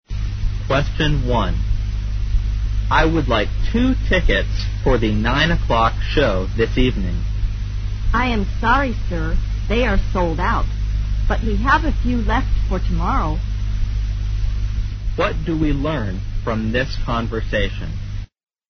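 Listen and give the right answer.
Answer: The 9 o'clock show this evening is sold out; there are a few tickets left for tomorrow.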